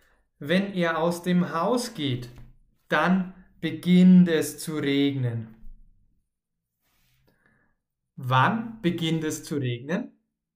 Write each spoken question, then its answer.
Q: Wann beginnt es zu regnen?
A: Wenn er aus dem Haus geht.